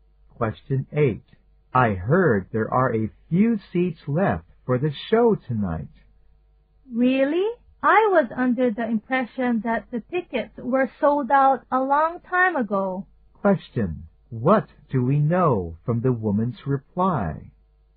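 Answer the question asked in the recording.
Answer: She thought the tickets had been sold out long ago.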